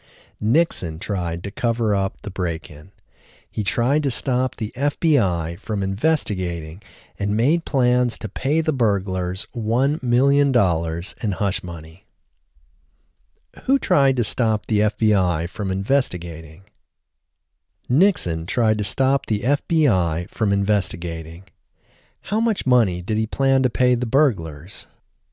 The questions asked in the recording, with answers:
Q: How much money did he plan to pay the burglars?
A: He planned to pay the burglars $1 million.